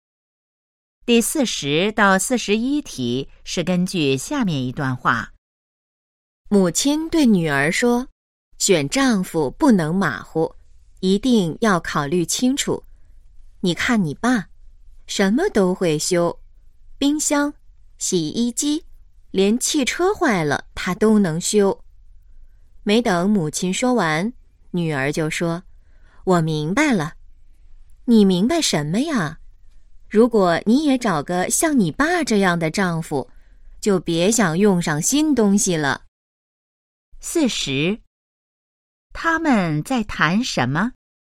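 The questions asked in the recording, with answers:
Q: 他们在谈什么?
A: 怎么选丈夫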